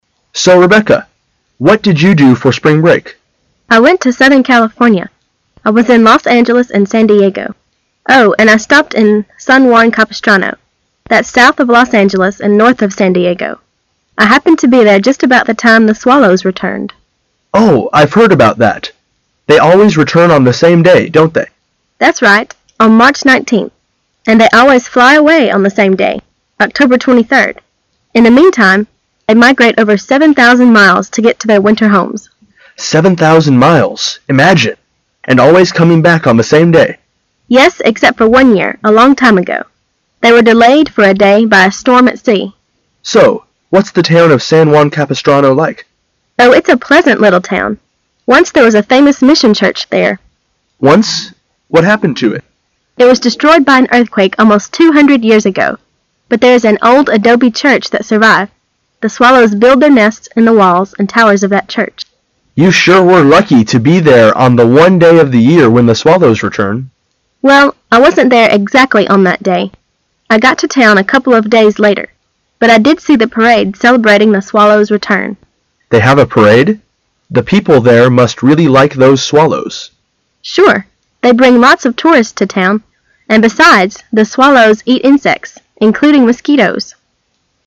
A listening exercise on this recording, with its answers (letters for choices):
Questions 1 to 4 are based on the following conversation. At the end of the conversation, you will by give 20 seconds to answer the questions. Now listen to the conversation.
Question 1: What can be inferred about the swallows mentioned in the conversation?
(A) They are a type of insect.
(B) They are a kind of fish.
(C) They are a type of bird.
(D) They are a type of pig.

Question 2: When do the swallows return to San Juan Capistrano?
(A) In March.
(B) In early summer.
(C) In October.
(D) In April.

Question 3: How far do the swallows migrate?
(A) About 200 miles.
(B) About 1,000 miles.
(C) About 7,000 miles.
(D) About 5,000 miles.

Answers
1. C
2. A
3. C

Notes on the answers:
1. 细节题。关于swallows。 [详细解答] They always return on the same day on March 19th,and fly away on the same day,October 23rd.因此可推测它们是一种鸟,因此选C。
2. 细节题。 [详细解答] Swallows何时回到San Juan Capistrano. They always return on March 19th.故选A。
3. 细节题。关于swallows飞越的距离。 [详细解答] 从对话中很清楚是答案C。从"They mi grate over 7,000 miles to get to their winter homes."

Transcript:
[解析] 1-4 M: So, Rebecca, what did you do for spring break? F: I went to southern California. I was in Los Angeles and San Diego. Oh, and I stopped in San Juan Capistrano. That's south of Los Angeles and north of San Diego. I happened to be there just about the time the swallows returned. M: Oh, I've heard about that——they always return on the same day, don't they? F: That's right, on March 19th. And they always fly away on the same day, October 23rd. In the meantime, they migrate over 7,000 miles to get to their winter homes. And always coming back on the same day! F: Yes, except for one year, a long time ago——they were delayed for a day by a storm at sea. M: So, what's the town of San Juan Capistrano like? F: Oh, it's a pleasant little town. Once there was a famous mission church there. M: Once? What happened to it? F: It was destroyed by an earthquake almost two hundred years ago. But there is an old adobe church that survived. The swallows build their nests in the walls and towers of that church. M: You sure were lucky to be there on the one day of the year when the swallows return. F: Well, I wasn't there exactly on that day. I got to town a couple of days later——but I did see the parade celebrating the swallows' return. They have a parade? The people there must really like those swallows. F: Sure——they bring lots of tourists to town, and be- sides, the swallows eat insects——including mosqui- toes!